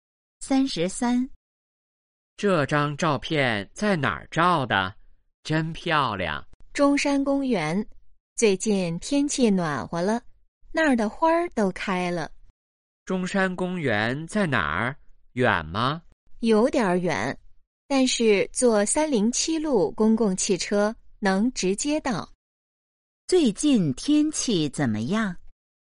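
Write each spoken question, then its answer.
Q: 最近天气怎么样?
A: 暖和了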